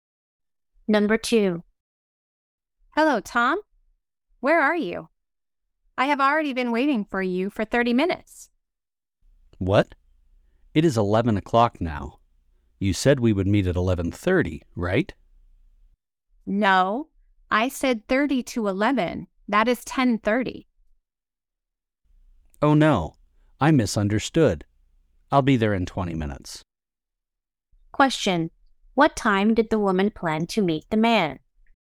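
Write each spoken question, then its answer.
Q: Question: What time did the woman plan to meet the man?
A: 10:30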